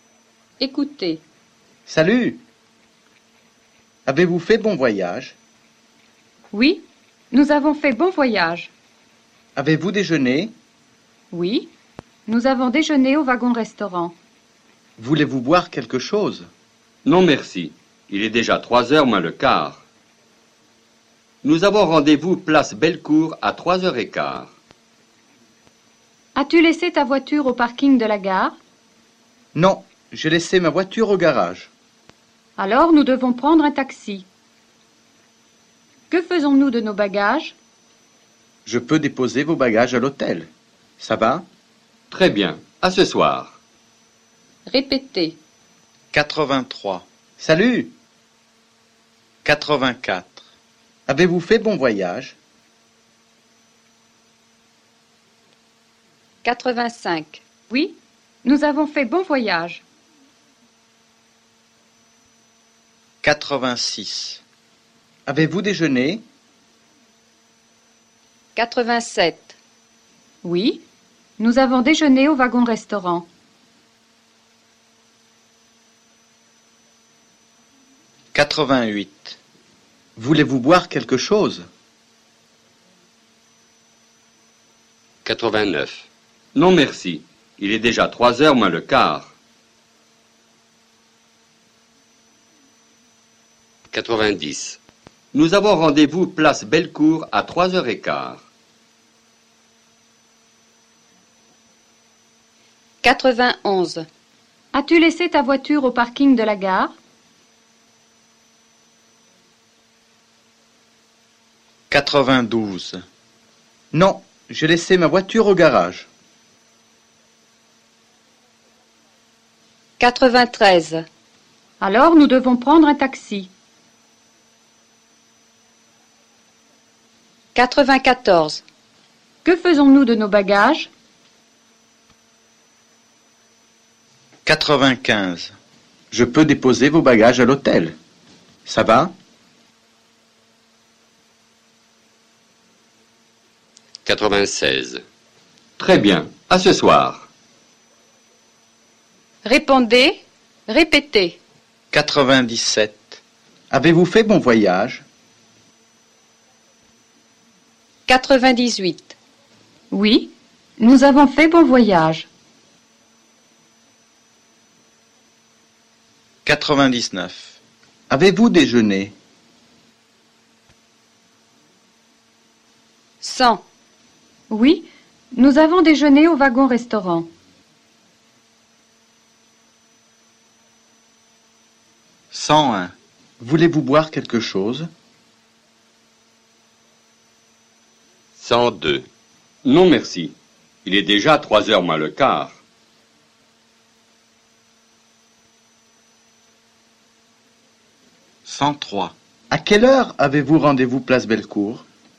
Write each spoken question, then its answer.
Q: À quelle heure avez-vous rendez-vous place Bellecour?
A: Nous avons rendez-vous place Bellecour à 3h15.